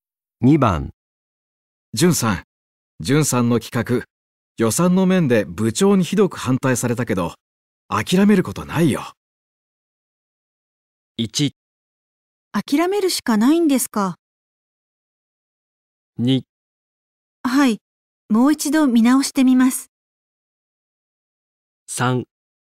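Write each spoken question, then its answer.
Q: 純さんの企画、予算の面で部長にひどく反対されたけど、諦めることないよ。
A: 2: はい、もう一度見直してみます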